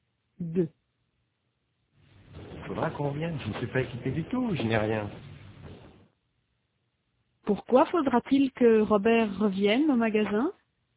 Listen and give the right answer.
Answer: Parce qu'il n'est pas équipé du tout, il n'a rien.